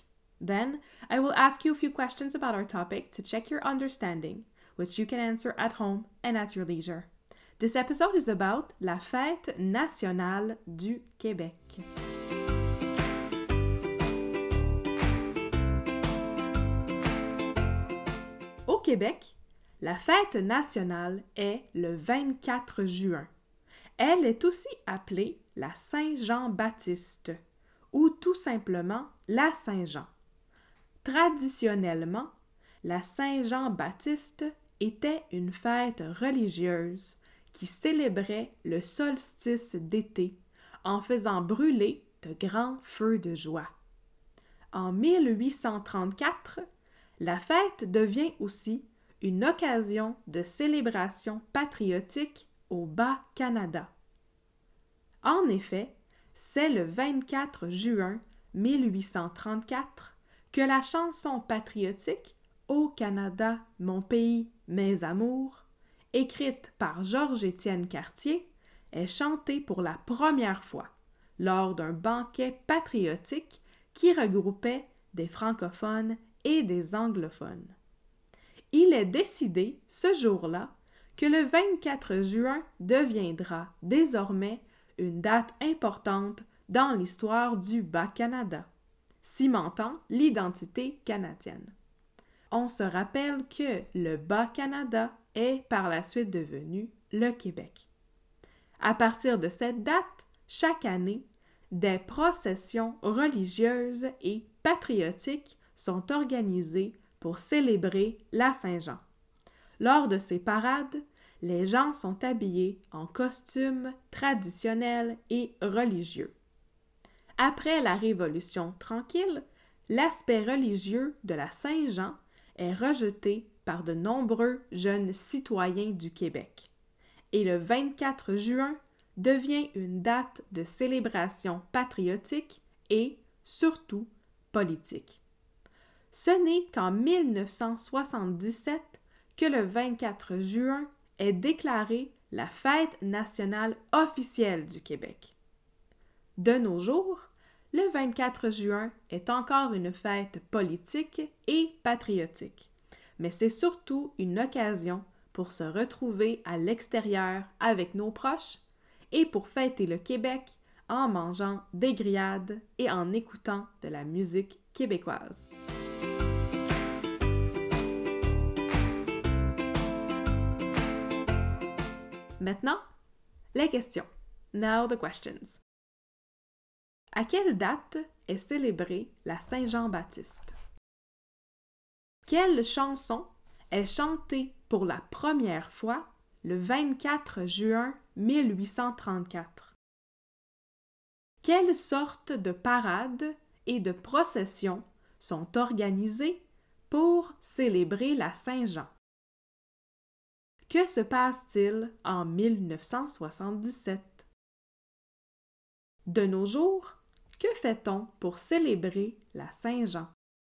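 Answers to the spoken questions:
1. Le 24 juin
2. Au Canada, mon pays, mes amours
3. Des processions religieuses et patriotiques
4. Le 24 juin est déclaré la fête nationale officielle du Québec
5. On se retrouve dehors avec nos proches, on mange des grillades et on écoute de la musique québécoise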